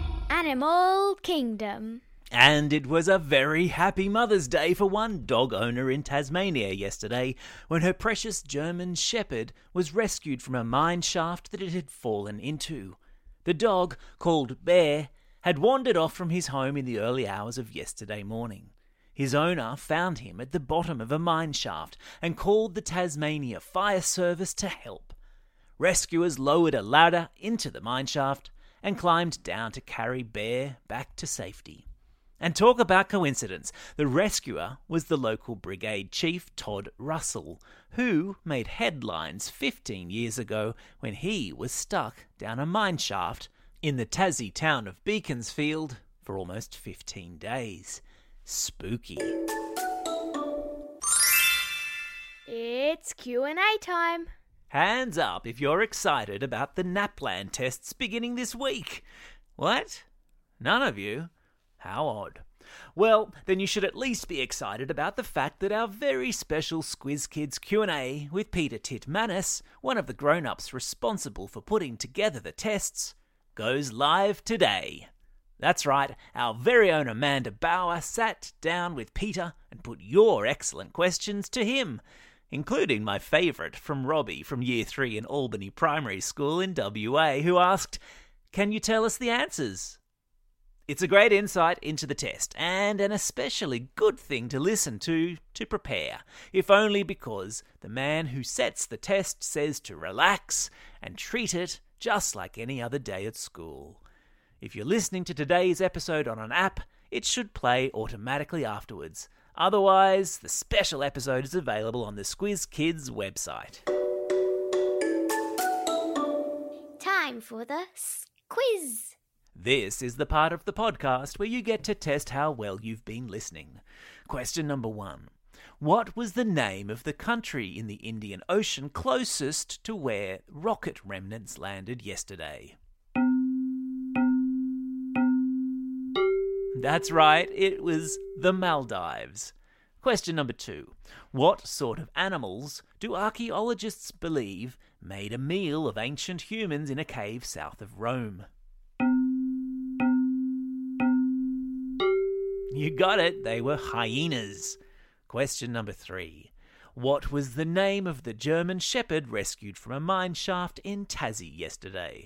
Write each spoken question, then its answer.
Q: What was the name of the German shepherd rescued from a mine shaft in Tassie yesterday?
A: Yeah, it was Bear.